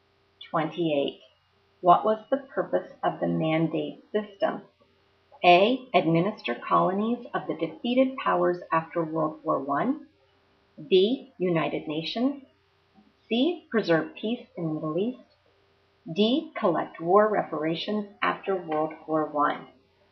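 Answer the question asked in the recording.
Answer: A: Administer colonies of the defeated powers after World War I.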